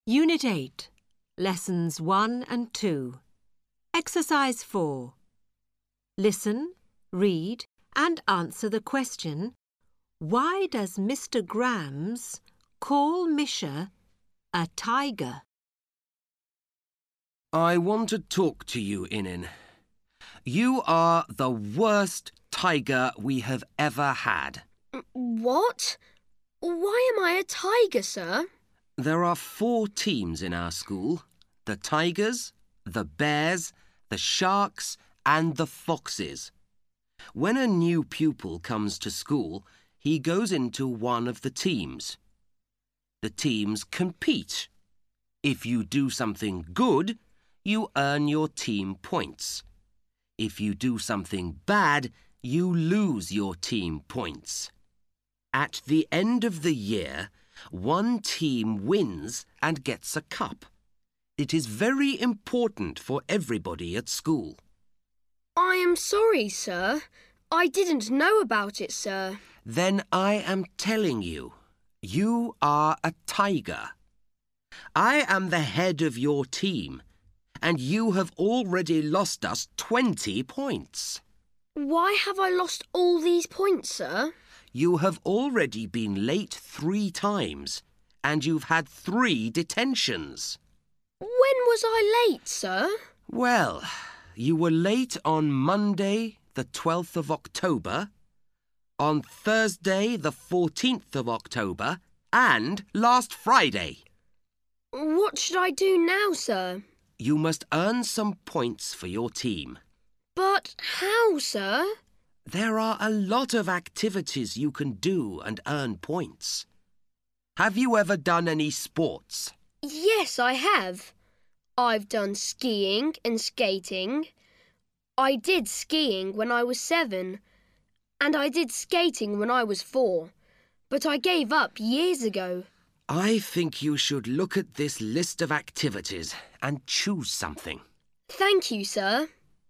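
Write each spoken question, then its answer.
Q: why does Mr. Grams call Misha a tiger?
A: Because Misha is in the Tigers team, one of the four school teams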